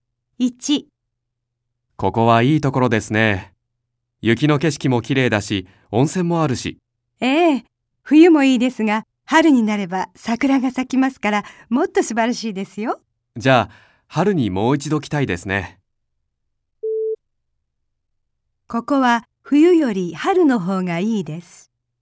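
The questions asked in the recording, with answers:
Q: ここは冬より春の方がいいです。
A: ○(正しい)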